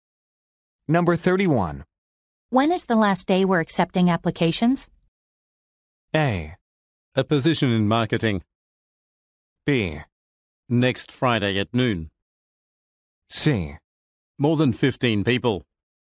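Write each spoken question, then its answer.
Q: When is the last day we're accepting applications?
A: B: Next Friday at noon.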